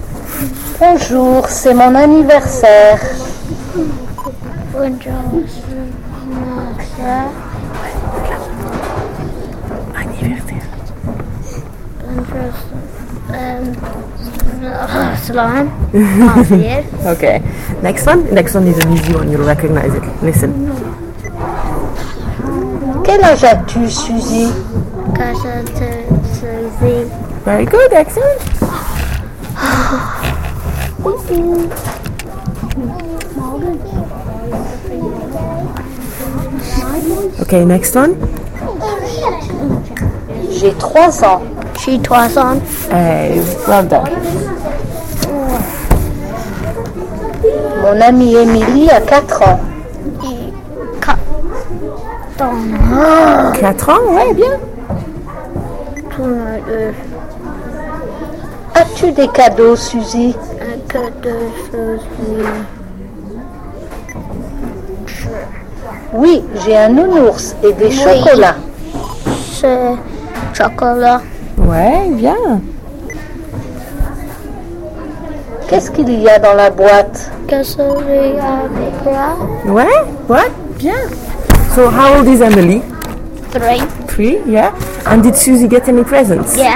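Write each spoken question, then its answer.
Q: And did Susie get any presents?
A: Yes, a teddy bear and chocolates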